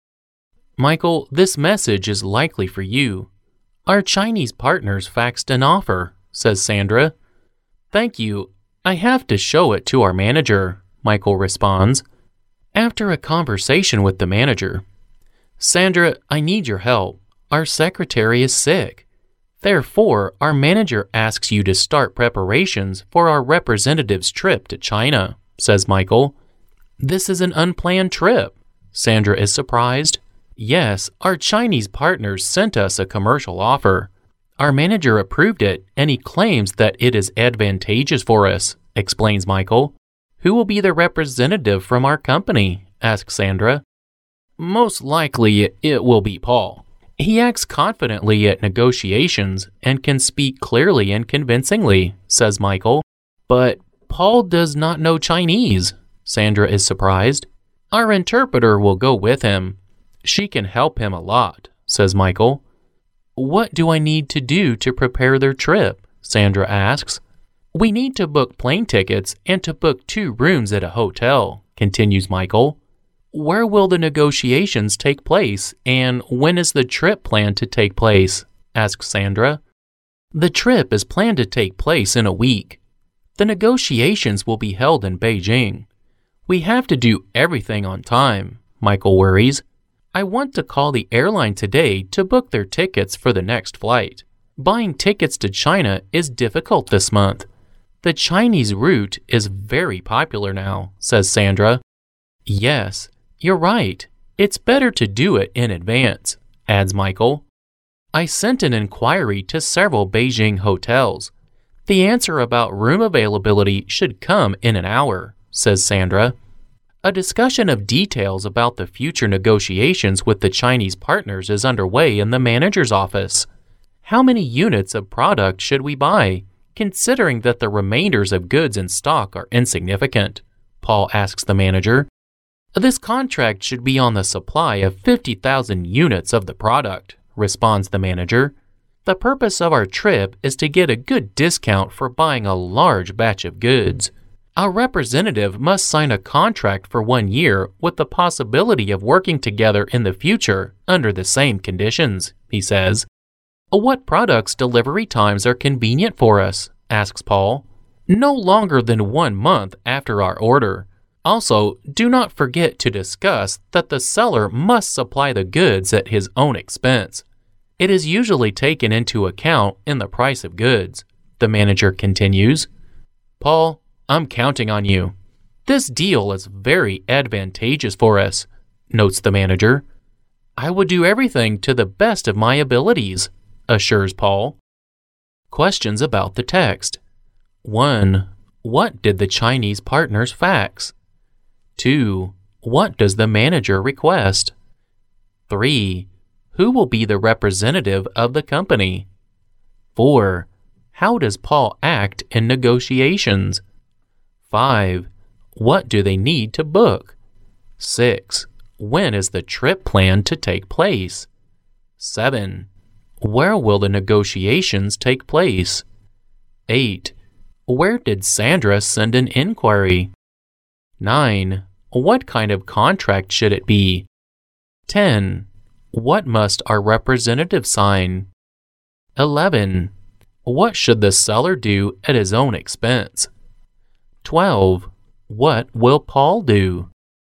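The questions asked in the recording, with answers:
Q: What did the Chinese partners fax?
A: A commercial offer

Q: What does the manager request?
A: That Sandra start preparations for the representative's trip to China

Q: Who will be the representative of the company?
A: Paul

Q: How does Paul act in negotiations?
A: Confidently, speaking clearly and convincingly

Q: What do they need to book?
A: Plane tickets and 2 hotel rooms

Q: When is the trip planned to take place?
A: In a week

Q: Where will the negotiations take place?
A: In Beijing

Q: Where did Sandra send an inquiry?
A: To several Beijing hotels

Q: What kind of contract should it be?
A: On the supply of 50,000 units of the product

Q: What must our representative sign?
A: A 1-year contract with the possibility of working together in the future under the same conditions

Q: What should the seller do at his own expense?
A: Supply the goods

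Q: What will Paul do?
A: Everything to the best of his abilities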